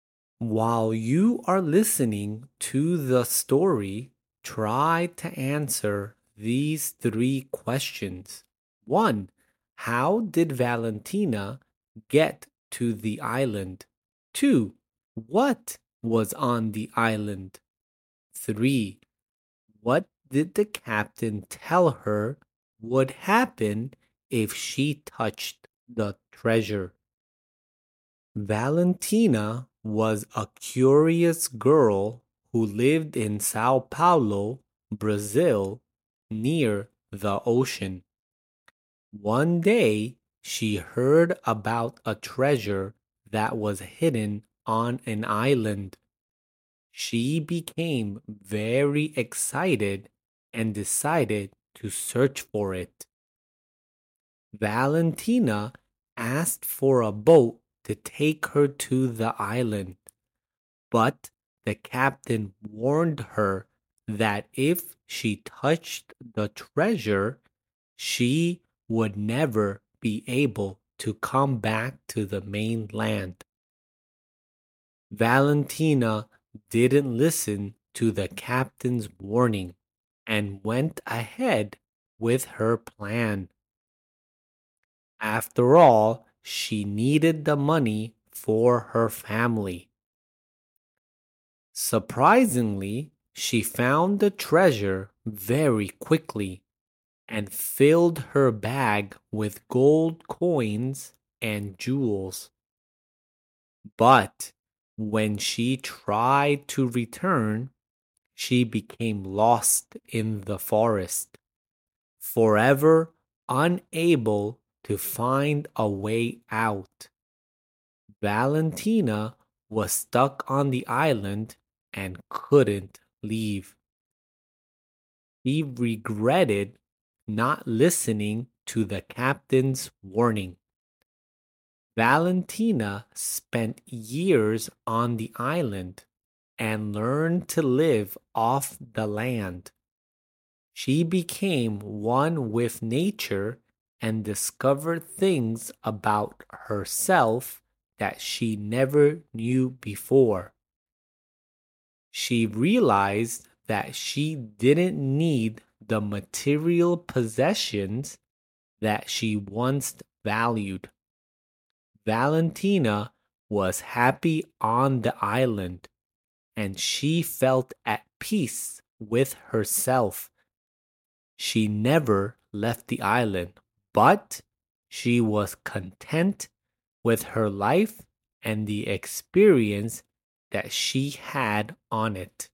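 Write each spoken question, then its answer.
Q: How did Valentina get to the island?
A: By boat

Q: What was on the island?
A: A hidden treasure

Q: What did the captain tell her would happen if she touched the treasure?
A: She would never be able to come back to the mainland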